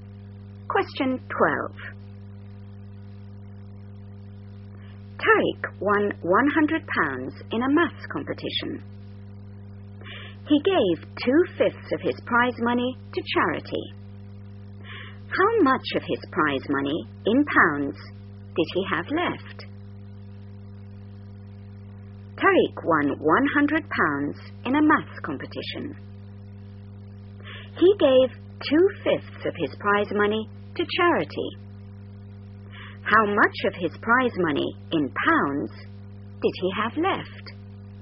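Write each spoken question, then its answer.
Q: How much of his prize money, in pounds, did he have left?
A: £60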